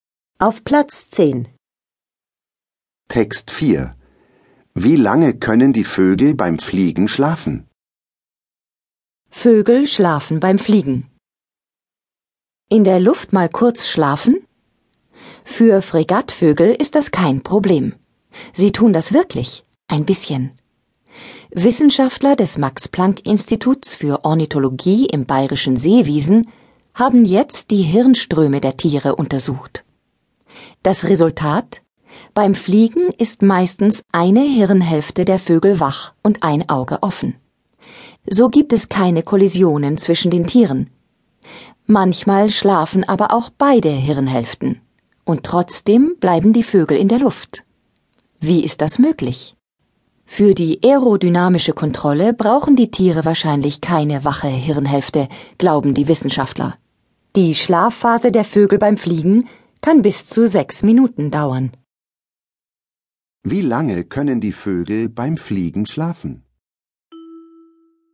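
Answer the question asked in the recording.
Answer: Bis zu sechs Minuten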